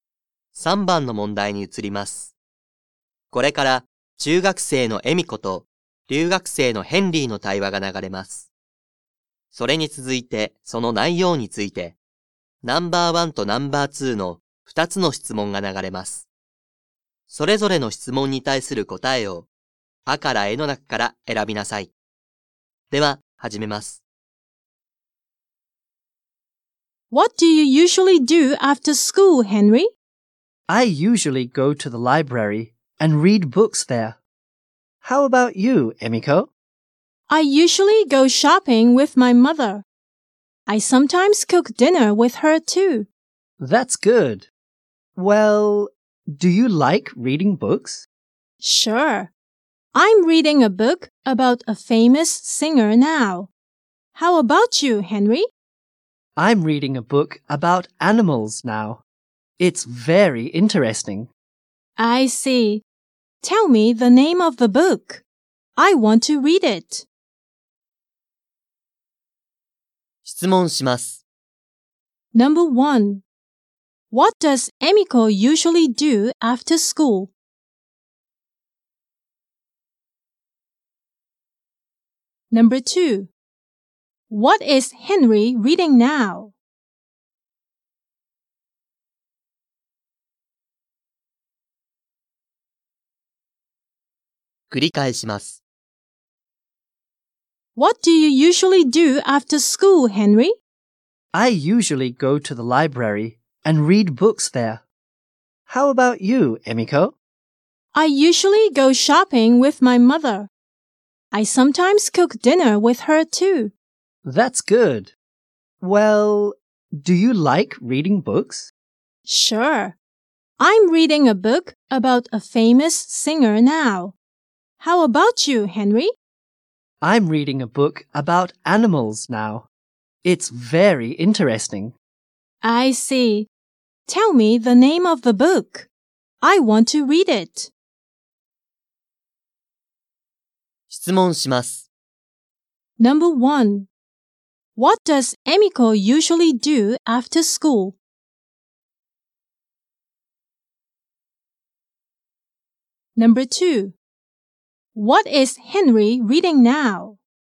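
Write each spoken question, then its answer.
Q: What does Emiko usually do after school?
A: She usually goes shopping with her mother.

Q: What is Henry reading now?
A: A book about animals.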